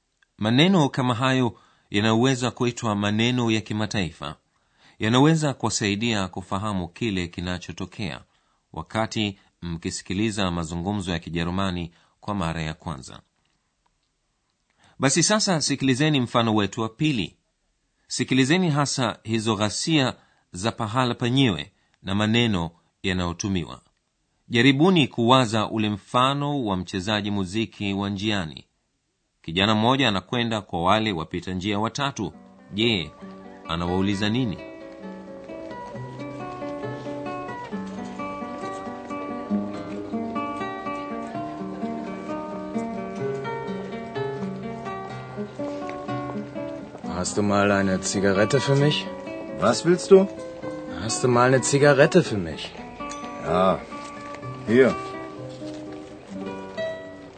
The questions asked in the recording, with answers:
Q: je anawauliza nini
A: Kijana huyo anamuuliza mmoja wao kama anayo sigara.